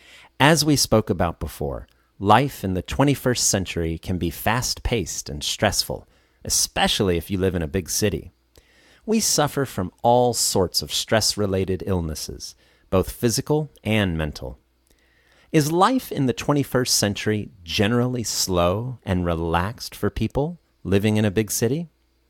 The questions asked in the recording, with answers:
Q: Is life in the 21st century generally slow and relaxed for people living in a big city?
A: Of course not. It's generally fast-paced and stressful.